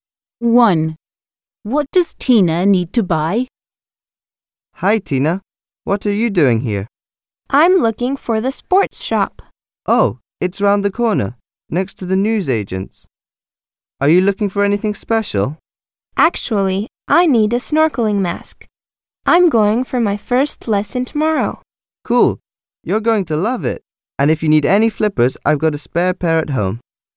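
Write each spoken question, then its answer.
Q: What does Tina need to buy?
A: a snorkeling mask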